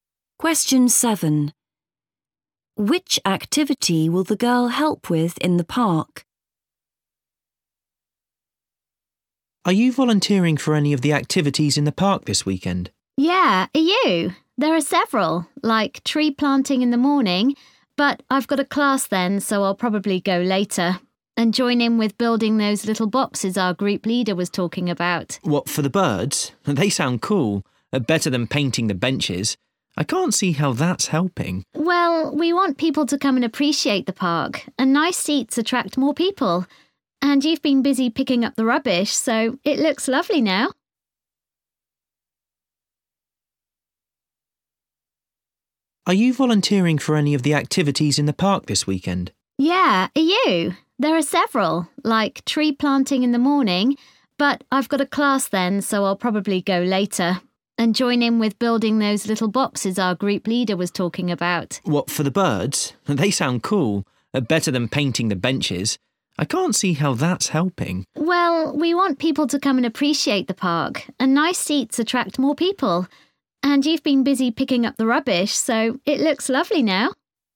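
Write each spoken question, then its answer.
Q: Which activity will the girl help with in the park?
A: building bird boxes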